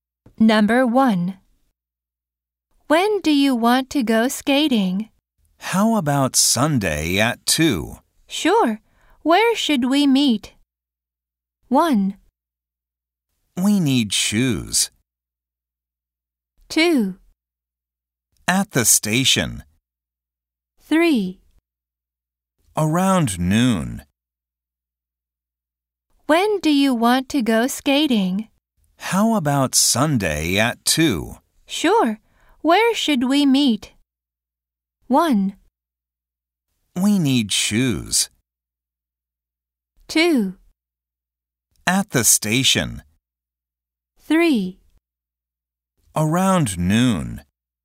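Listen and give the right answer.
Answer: 2: At the station.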